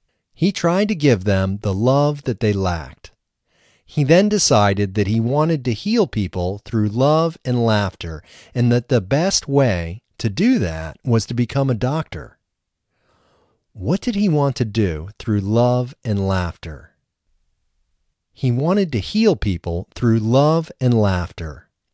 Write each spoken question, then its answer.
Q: What did he want to do through love and laughter?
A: He wanted to heal people through love and laughter.